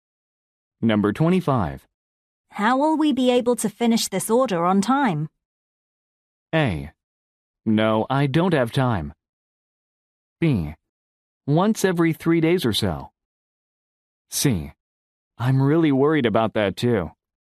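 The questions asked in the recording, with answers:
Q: How will we be able to finish this order on time?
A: C: I'm really worried about that too.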